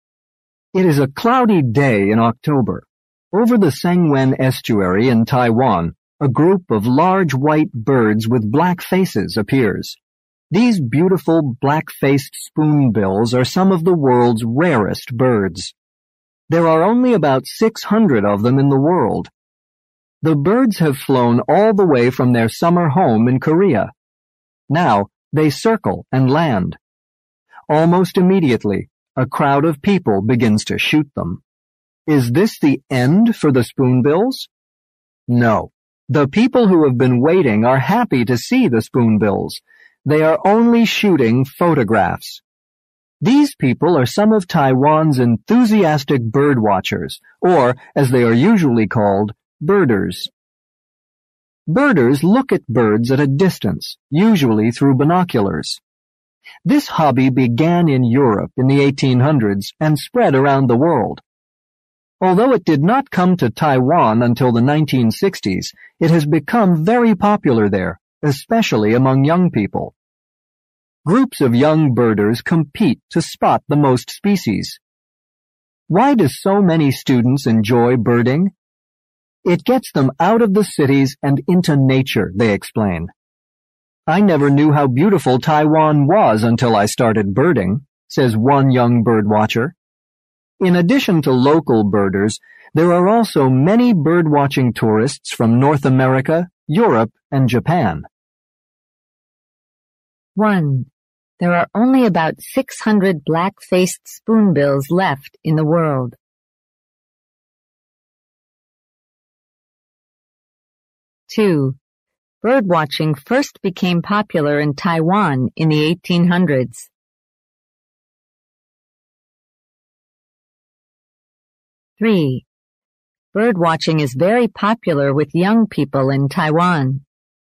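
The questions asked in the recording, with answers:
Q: There are only about 600 black-faced spoonbills left in the world.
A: True

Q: Birdwatching first became popular in Taiwan in the 1800s.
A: False

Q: Birdwatching is very popular with young people in Taiwan.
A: True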